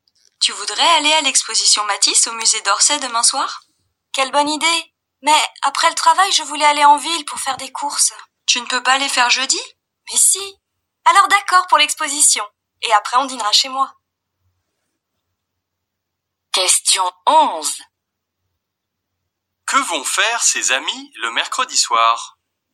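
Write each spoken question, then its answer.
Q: Que vont faire ses amis le mercredi soir?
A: Aller à l'exposition Matisse puis dîner chez l'un d'eux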